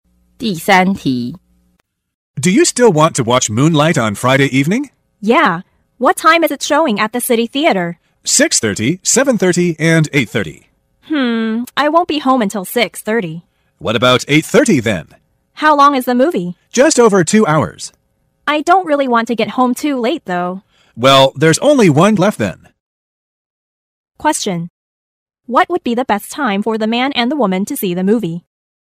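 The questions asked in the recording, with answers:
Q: What would be the best time for the man and the woman to see the movie?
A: 7:30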